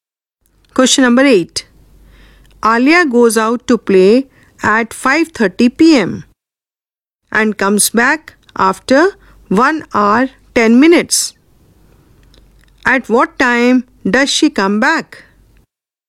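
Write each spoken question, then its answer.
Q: At what time does she come back?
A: 6:40 p.m.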